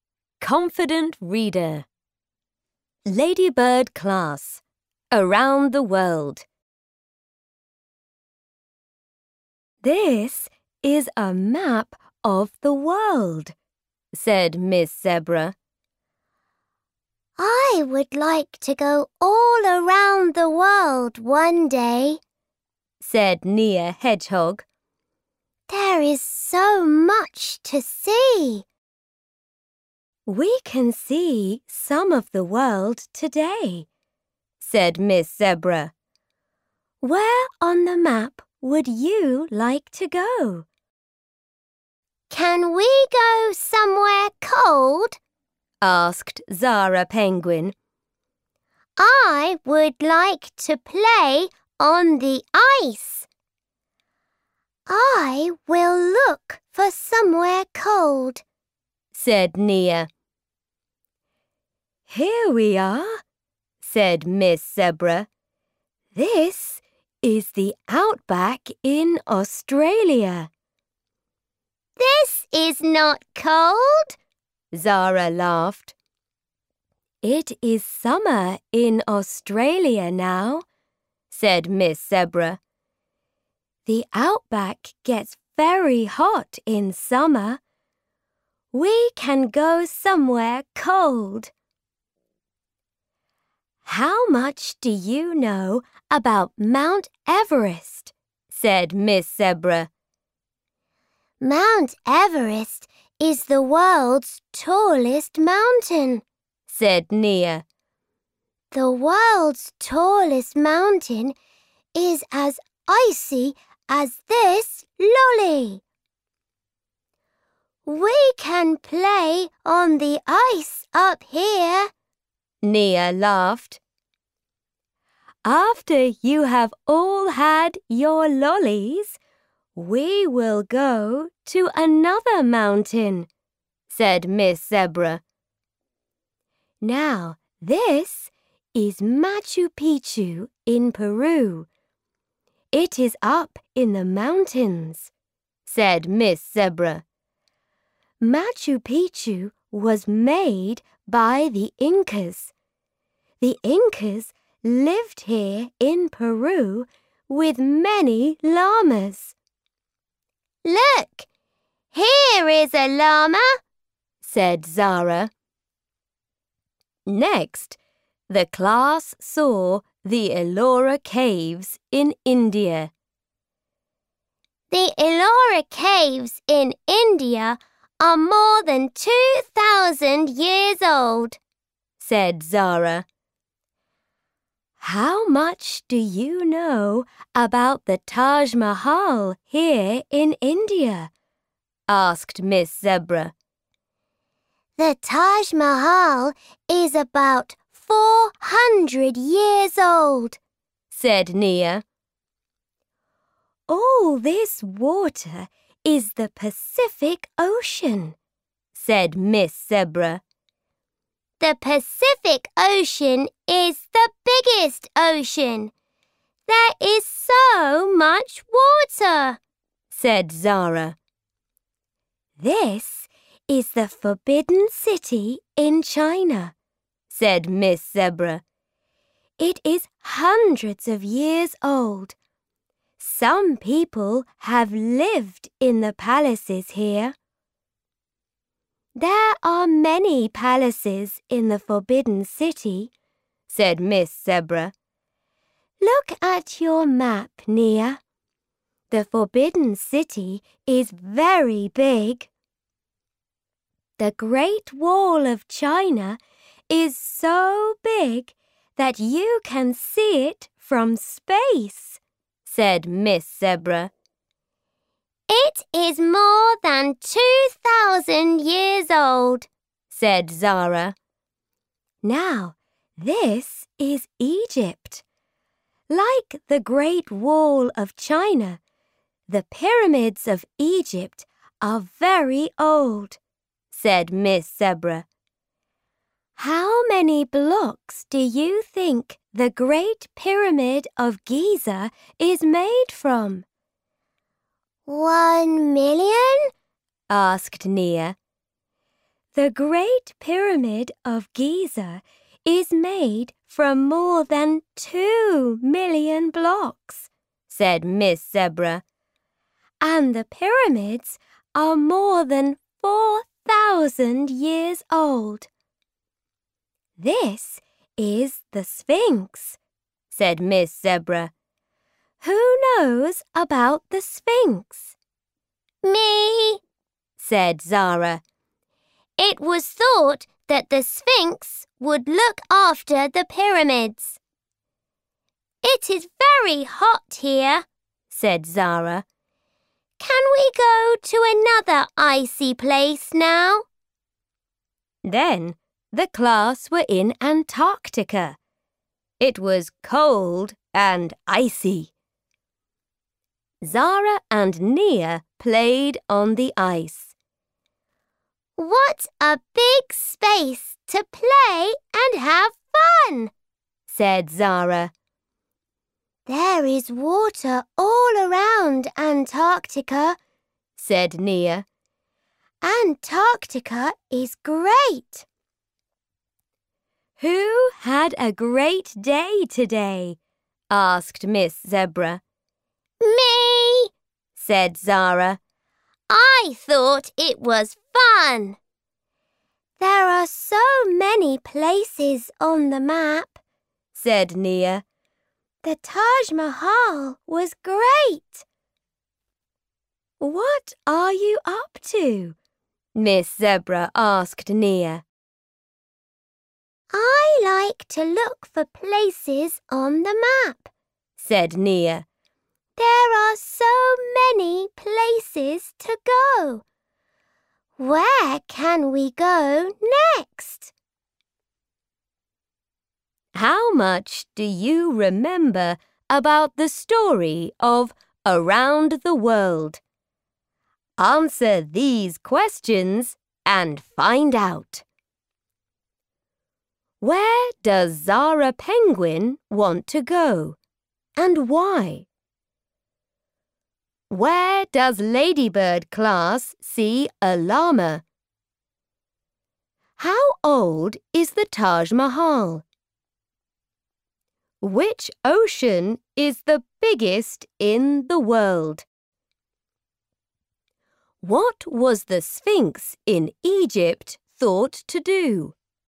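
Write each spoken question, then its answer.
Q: Where does Zara Penguin want to go and why?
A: Somewhere cold, to play on the ice

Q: Where does Ladybird class see a llama?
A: Machu Picchu in Peru

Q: How old is the Taj Mahal?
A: About 400 years old

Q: Which ocean is the biggest in the world?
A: The Pacific Ocean

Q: What was the Sphinx in Egypt thought to do?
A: Look after the pyramids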